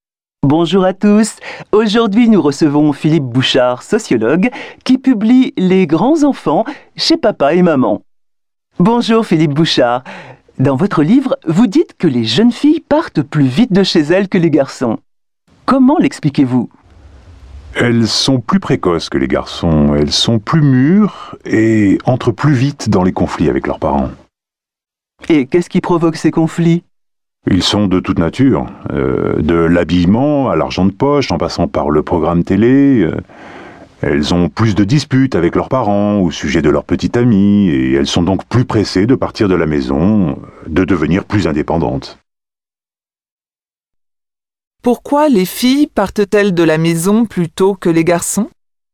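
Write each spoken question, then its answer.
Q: Pourquoi les filles partent-elles de la maison plutôt que les garçons?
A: Elles sont plus précoces et plus mûres, elles entrent plus vite en conflit avec leurs parents et veulent devenir indépendantes.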